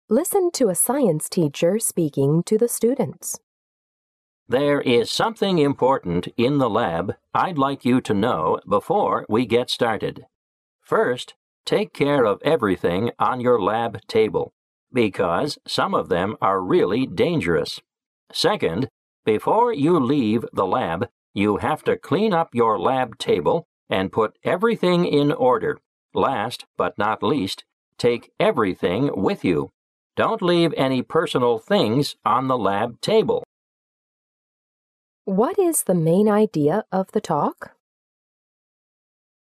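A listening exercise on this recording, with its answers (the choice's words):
What is the main idea of the talk?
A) The teacher reminds the students to clean the lab regularly.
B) The teacher warns the students not to touch anything dangerous in the lab.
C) The teacher informs the students of some rules in the lab.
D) The teacher tells the students to clear everything before leaving the lab.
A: The teacher informs the students of some rules in the lab.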